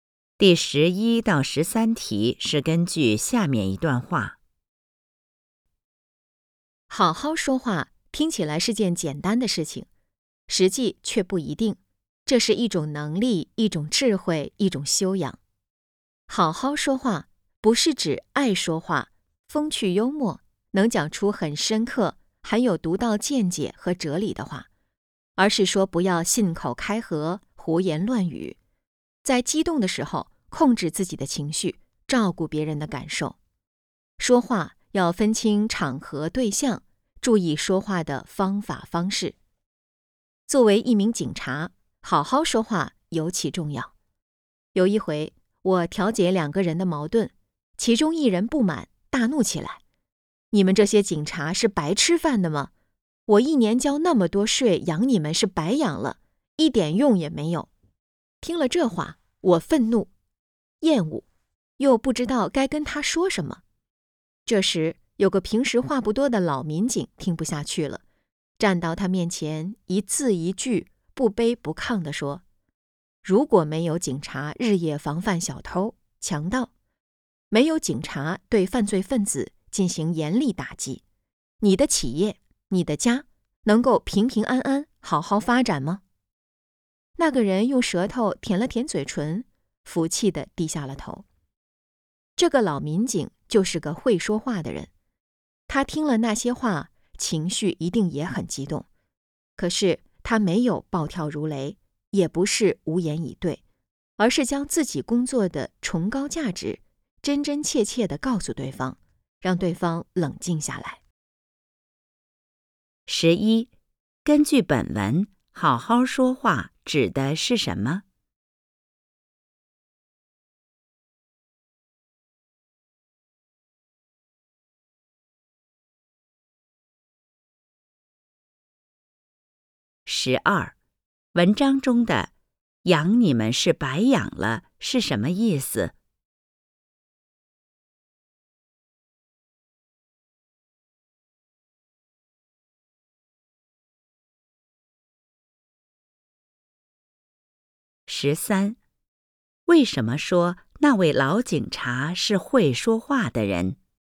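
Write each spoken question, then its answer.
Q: 根据本文,好好说话指的是什么?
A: 不信口开河,控制情绪,照顾别人的感受,分清场合对象

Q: 文章中的"养你们是白养了"是什么意思?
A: 警察没有用,白花了纳税人的钱

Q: 为什么说那位老警察是会说话的人?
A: 他控制住情绪,把警察工作的崇高价值告诉对方,让对方冷静下来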